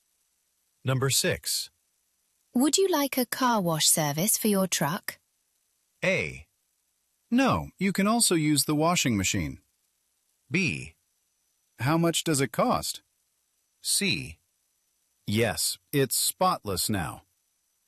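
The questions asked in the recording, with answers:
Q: Would you like a car wash service for your truck?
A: B: How much does it cost?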